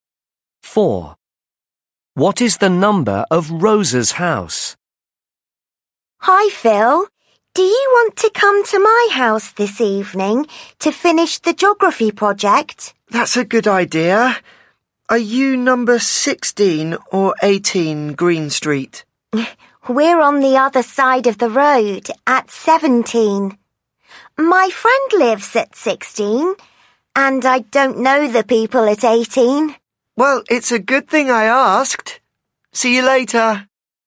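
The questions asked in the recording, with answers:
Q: What is the number of Rosa's house?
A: 17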